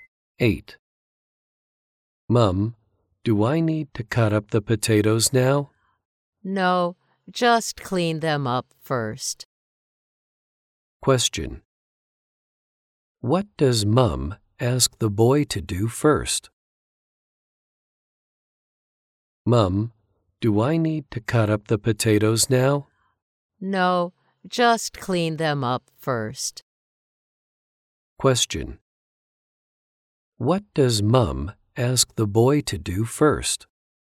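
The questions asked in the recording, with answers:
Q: What does Mum ask the boy to do first?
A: Clean the potatoes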